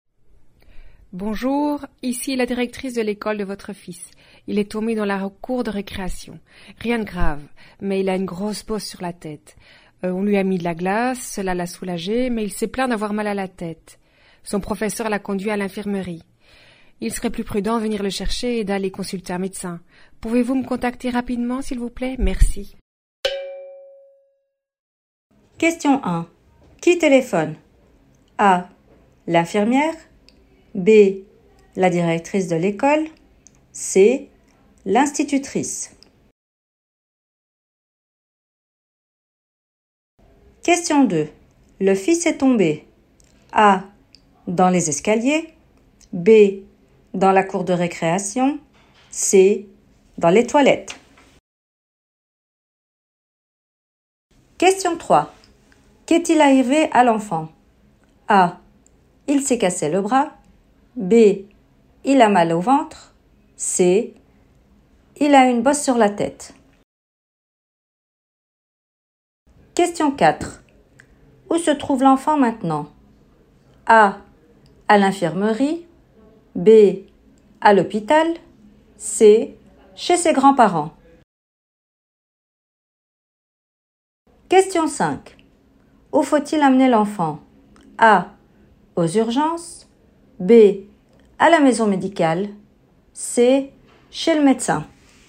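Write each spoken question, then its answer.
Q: Qui téléphone?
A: B: La directrice de l'école.

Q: Le fils est tombé.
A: B: Dans la cour de récréation.

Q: Qu'est-il arrivé à l'enfant?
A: C: Il a une bosse sur la tête.

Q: Où se trouve l'enfant maintenant?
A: A: À l'infirmerie.

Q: Où faut-il amener l'enfant?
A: C: Chez le médecin.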